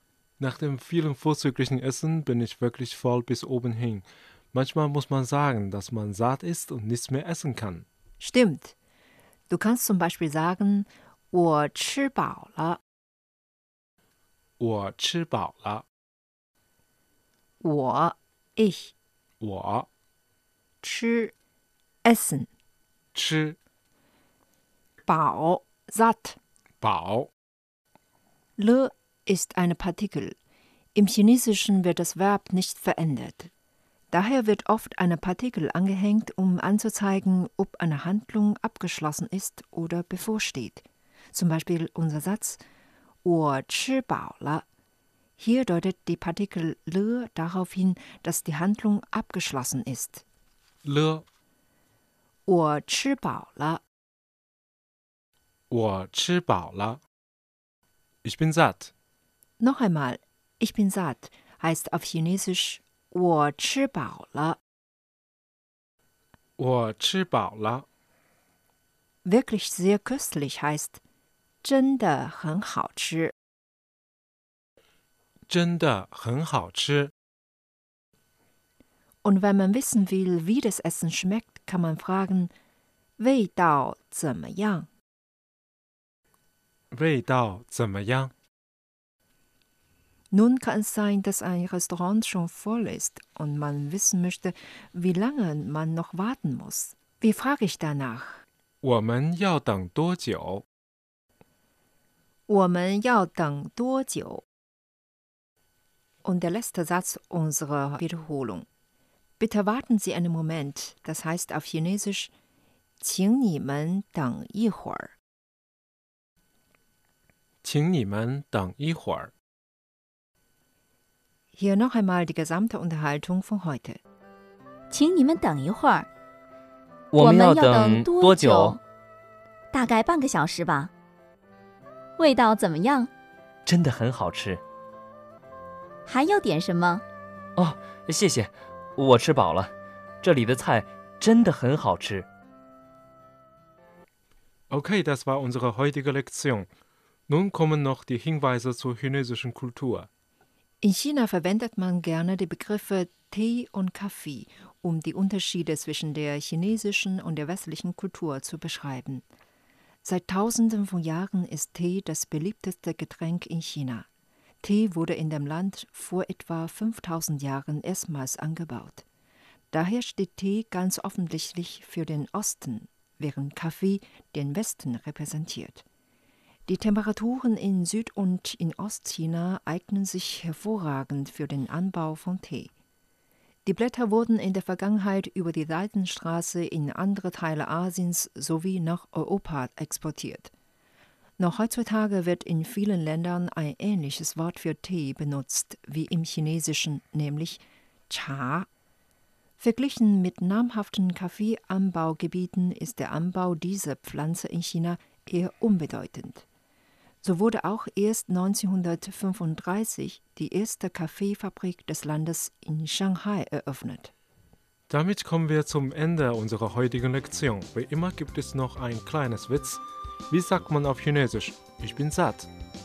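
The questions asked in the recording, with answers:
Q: Wie sagt man auf Chinesisch? Ich bin satt.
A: 我吃饱了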